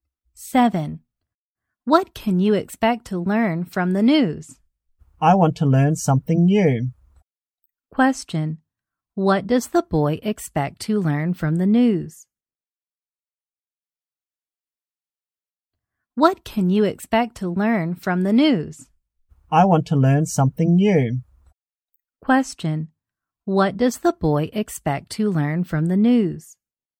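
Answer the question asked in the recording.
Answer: Something new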